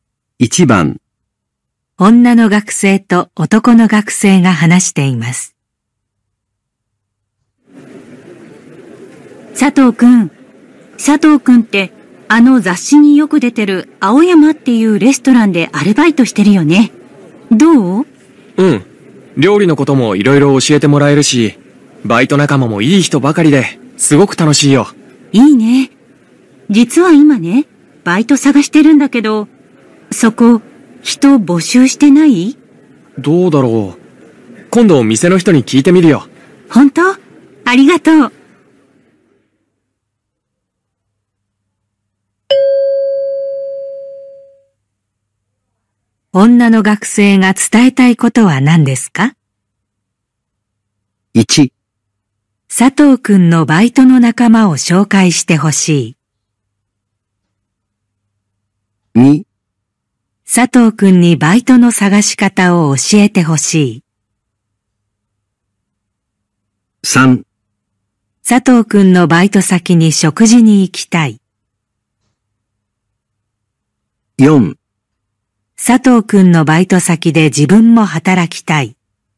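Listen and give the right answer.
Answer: 4: 佐藤くんのバイト先で自分も働きたい。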